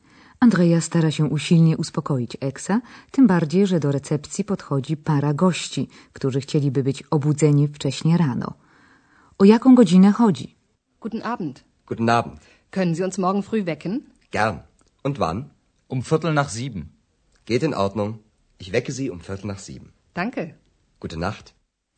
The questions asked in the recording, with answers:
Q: O jaką godzinę chodzi?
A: Małżeństwo życzy sobie budzenie około siódmej, a konkretnie kwadrans po siódmej.